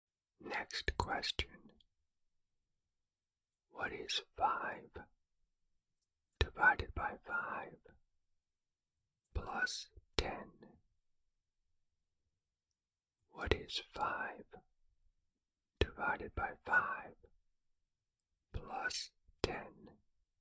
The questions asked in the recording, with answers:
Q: What is 5 divided by 5 plus 10?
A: The answer is 11.